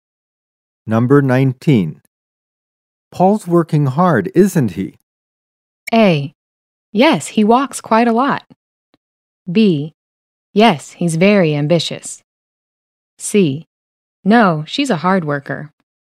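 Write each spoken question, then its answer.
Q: Paul's working hard, isn't he?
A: B: Yes, he's very ambitious.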